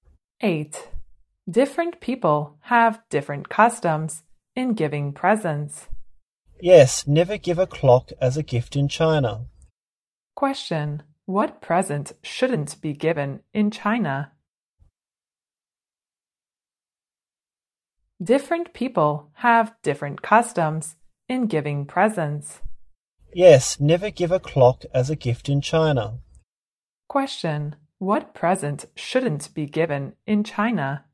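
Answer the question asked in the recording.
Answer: A clock.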